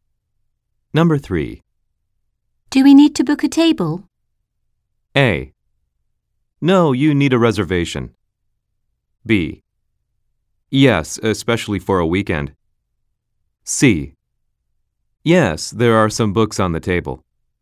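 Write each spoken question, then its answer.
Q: Do we need to book a table?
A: B: Yes, especially for a weekend.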